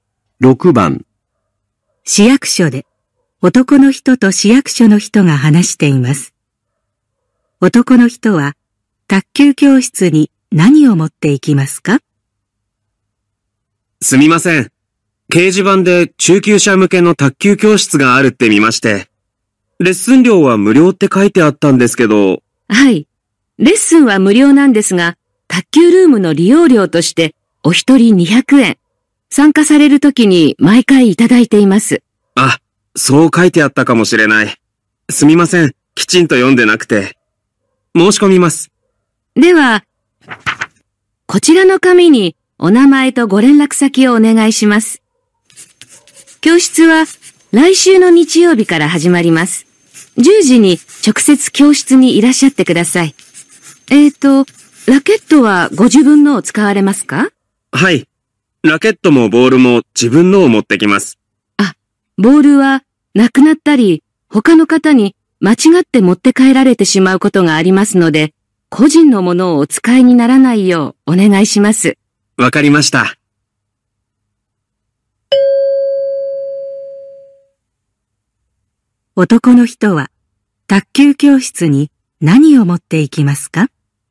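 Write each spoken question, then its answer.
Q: 男の人は卓球教室に何を持っていきますか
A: ラケット(と利用料200円)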